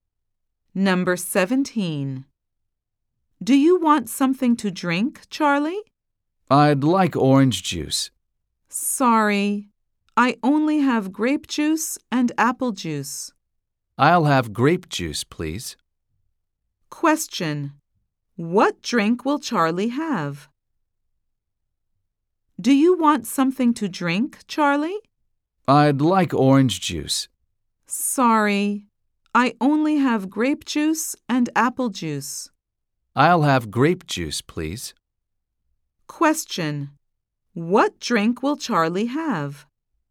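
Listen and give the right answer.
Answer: Grape juice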